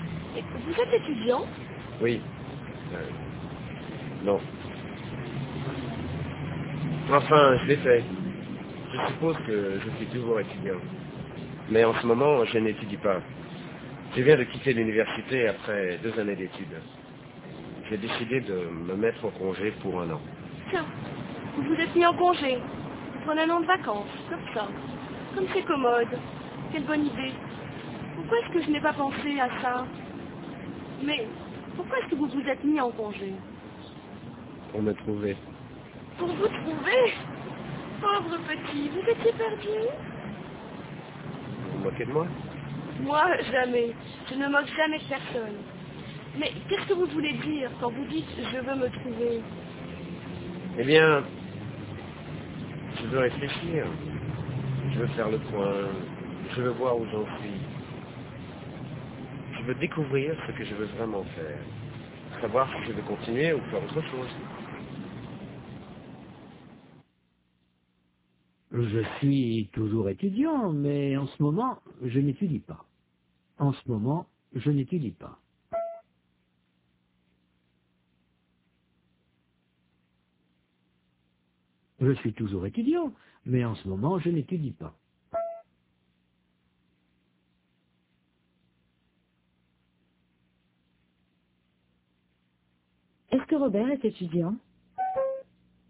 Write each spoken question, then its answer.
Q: Est-ce que Robert est étudiant?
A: Oui, mais en ce moment, il n'étudie pas.